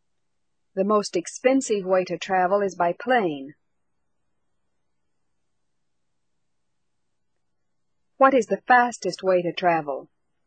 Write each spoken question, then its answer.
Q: What is the fastest way to travel?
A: The fastest way to travel is by plane.